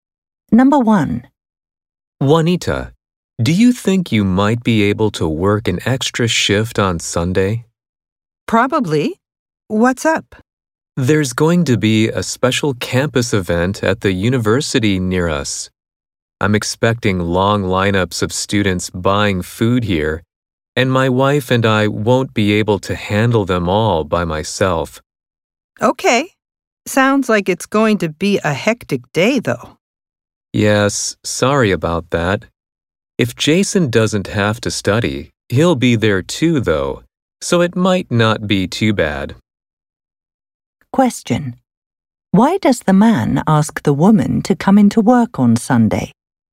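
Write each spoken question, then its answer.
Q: Why does the man ask the woman to come into work on Sunday?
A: He expects many students buying food because of a special campus event.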